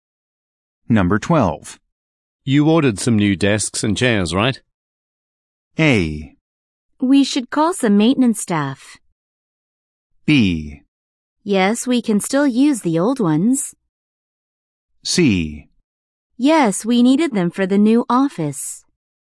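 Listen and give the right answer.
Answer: C: Yes, we needed them for the new office.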